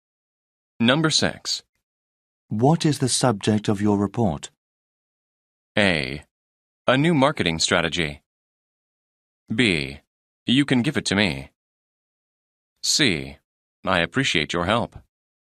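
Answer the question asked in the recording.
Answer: A: A new marketing strategy.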